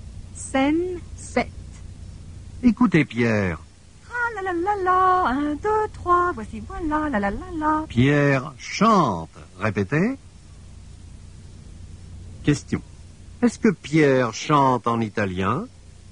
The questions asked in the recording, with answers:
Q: Est-ce que Pierre chante en italien?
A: Non, Pierre ne chante pas en italien.